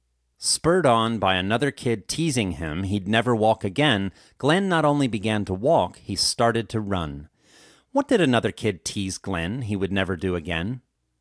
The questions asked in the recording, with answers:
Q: What did another kid tease Glenn he would never do again?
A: Another kid teased Glenn he would never walk again.